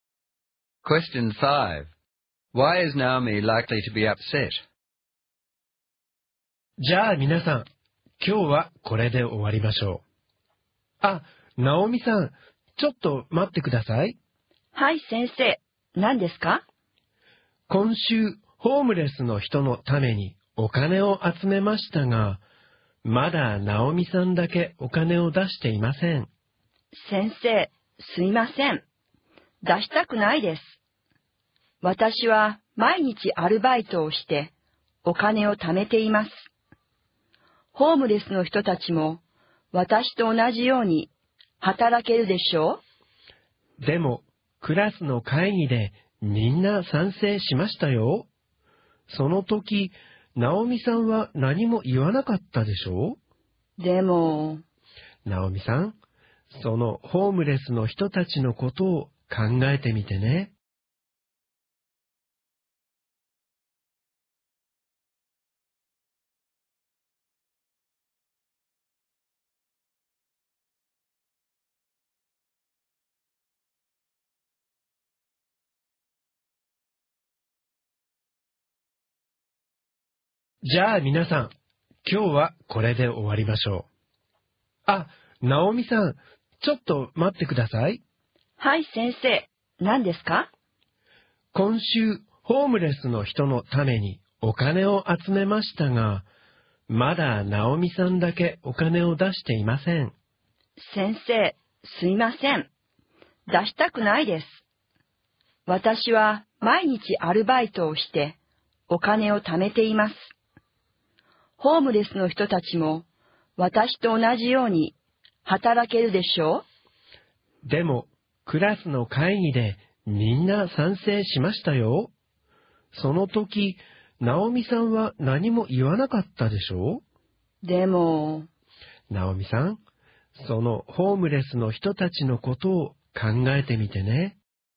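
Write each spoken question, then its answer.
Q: Why is Naomi likely to be upset?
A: She is the only one who hasn't given money for the homeless, and the teacher pressures her to contribute even though she works part-time to save her own money and thinks homeless people can work too.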